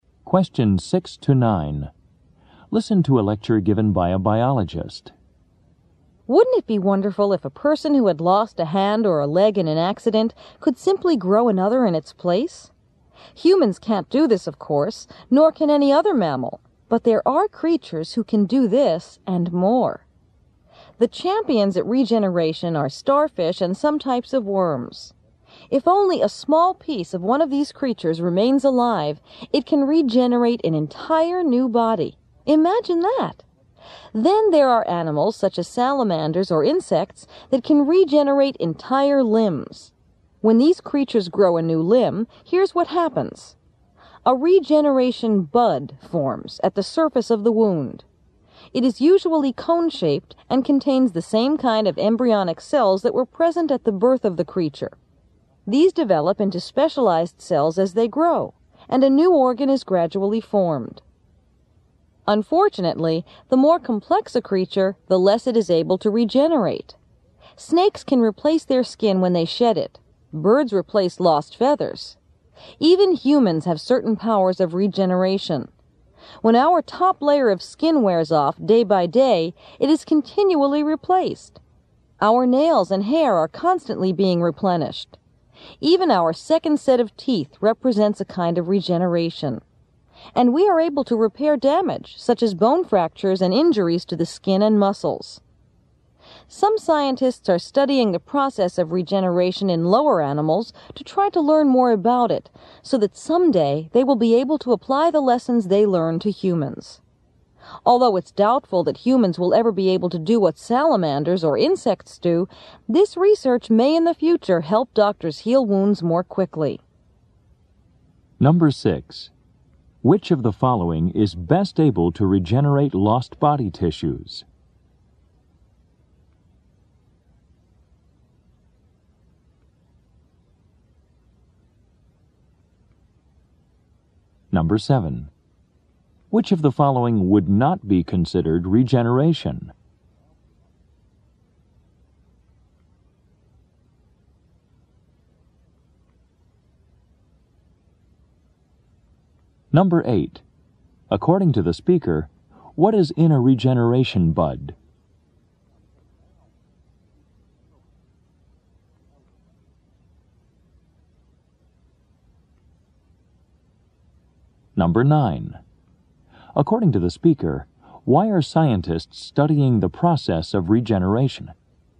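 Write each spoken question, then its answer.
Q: Which of the following is best able to regenerate lost body tissues?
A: Starfish and some types of worms

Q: According to the speaker, what is in a regeneration bud?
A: Embryonic cells like those present at the creature's birth

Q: According to the speaker, why are scientists studying the process of regeneration?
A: To apply what they learn to humans, perhaps helping wounds heal faster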